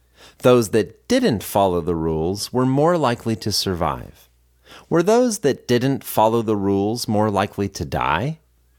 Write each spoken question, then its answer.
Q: Were those that didn't follow the rules more likely to die?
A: No, those that didn't follow the rules were not more likely to die.